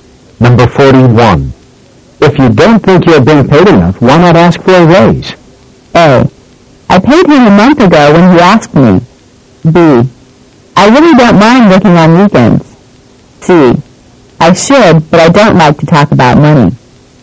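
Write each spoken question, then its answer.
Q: If you don't think you're being paid enough, why not ask for a raise?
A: C: I should, but I don't like to talk about money.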